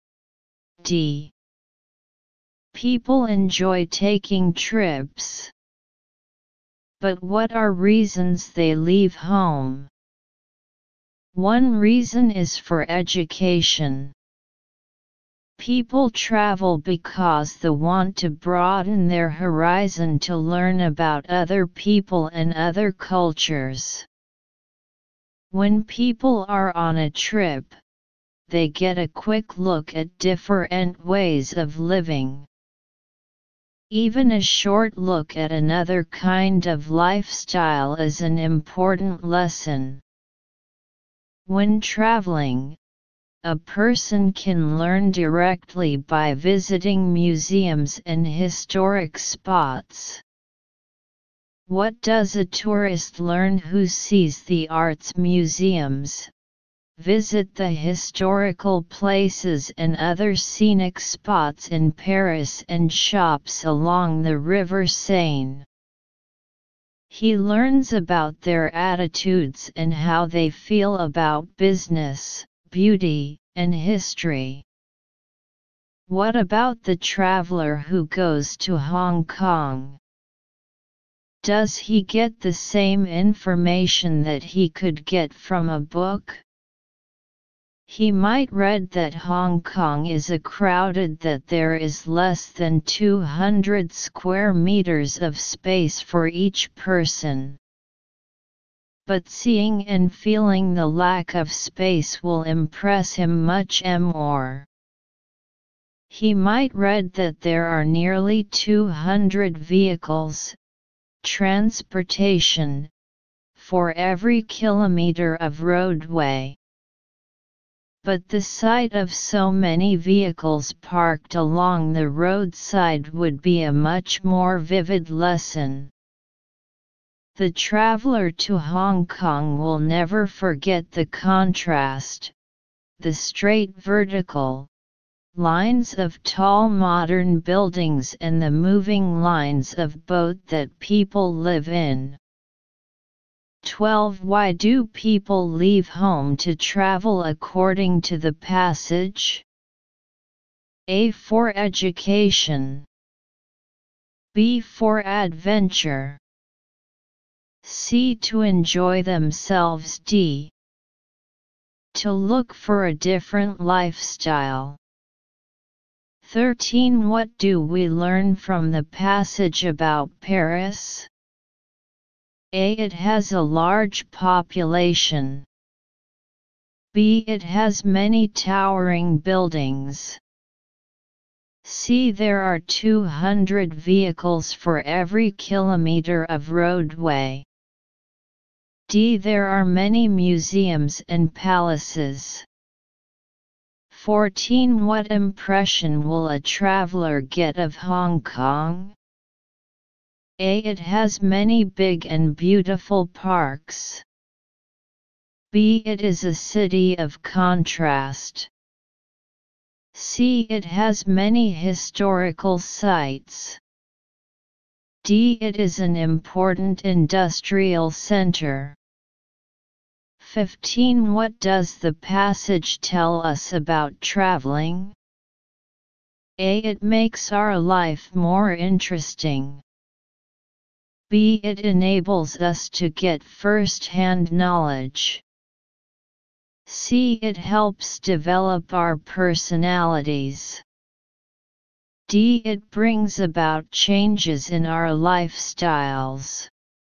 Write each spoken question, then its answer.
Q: Why do people leave home to travel according to the passage?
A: 12. A.

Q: What do we learn from the passage about Paris?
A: 13. D.

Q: What impression will a traveler get of Hong Kong?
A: 14. B.

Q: What does the passage tell us about traveling?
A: 15. B.